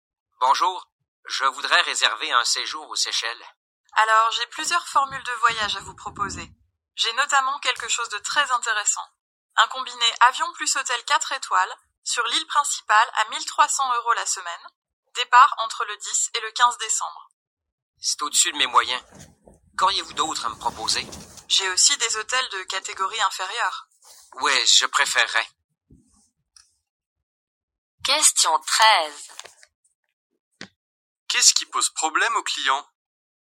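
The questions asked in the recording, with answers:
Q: Qu'est-ce qui pose problème aux clients?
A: Le prix, trop cher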